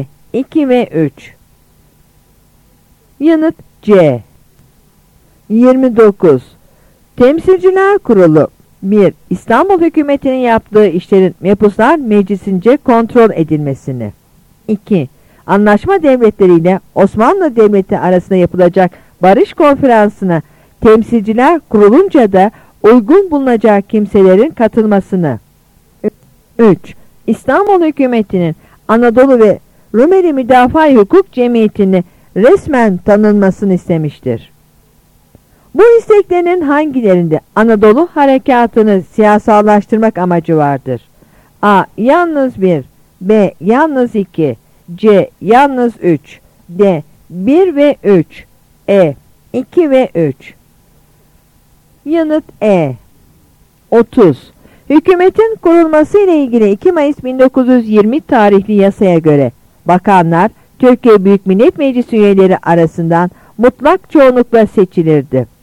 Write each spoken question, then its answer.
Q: Bu isteklerinin hangilerinde Anadolu Harekatı'nı siyasallaştırmak amacı vardır?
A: Yanıt E.